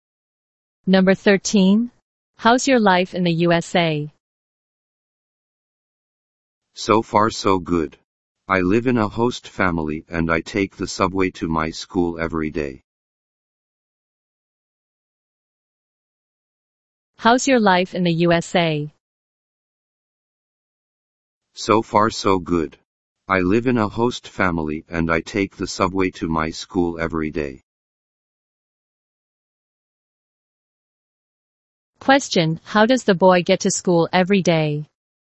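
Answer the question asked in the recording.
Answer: By subway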